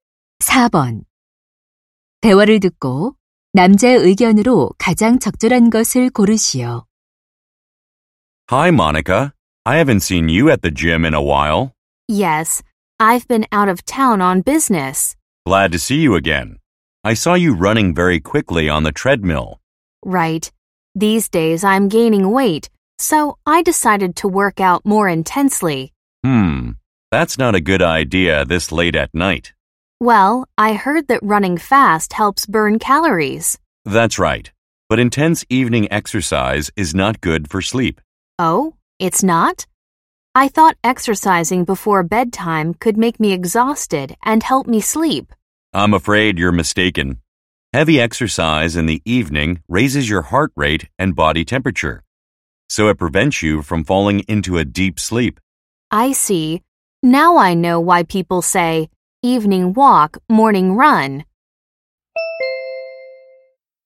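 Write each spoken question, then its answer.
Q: 대화를 듣고 남자의 의견으로 가장 적절한 것을 고르시오.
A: 저녁의 격렬한 운동은 숙면에 방해가 된다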